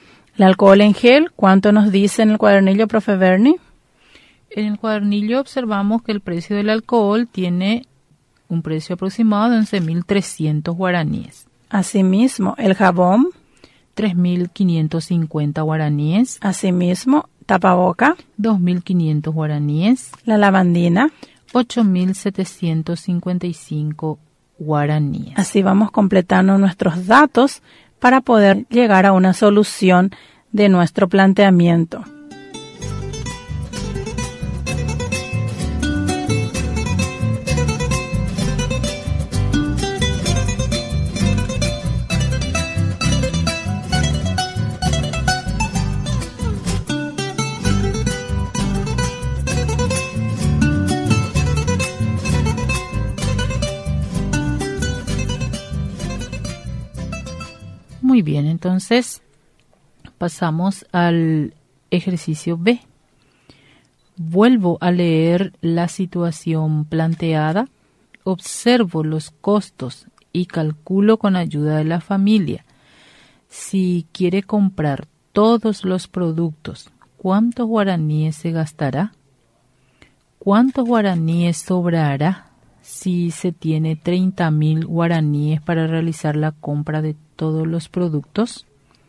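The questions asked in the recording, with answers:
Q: Si quiere comprar todos los productos, ¿cuántos guaraníes se gastará?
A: 26.105 guaraníes

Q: ¿cuántos guaraníes sobrará si se tiene 30.000 guaraníes para realizar la compra de todos los productos?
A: 3.895 guaraníes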